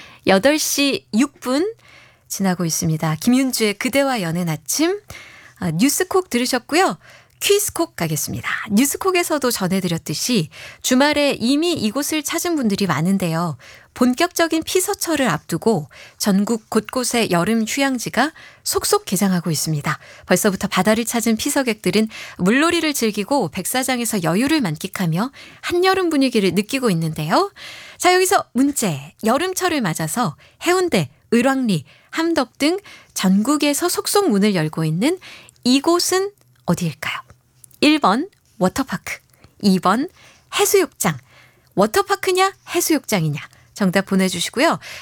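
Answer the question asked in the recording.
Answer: 2: 해수욕장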